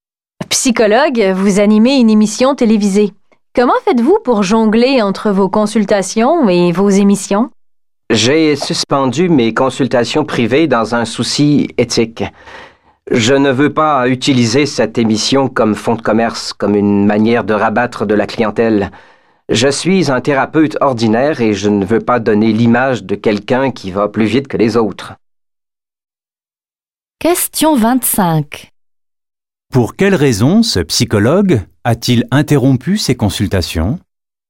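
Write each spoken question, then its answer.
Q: Pour quelle raison ce psychologue a-t-il interrompu ses consultations?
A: Pour des raisons éthiques : il ne veut pas utiliser l'émission pour attirer des clients.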